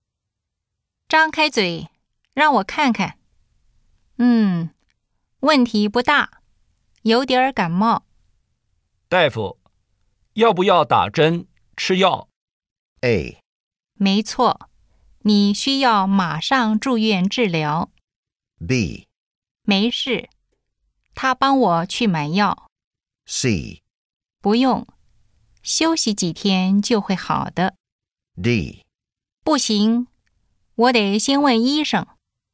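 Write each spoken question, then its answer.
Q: 大夫,要不要打针吃药?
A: C: 不用,休息几天就会好的。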